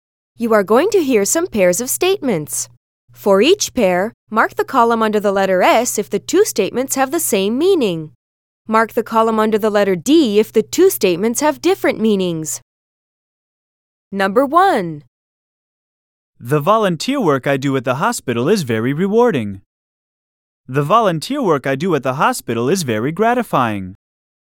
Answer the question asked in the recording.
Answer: Same is the correct answer.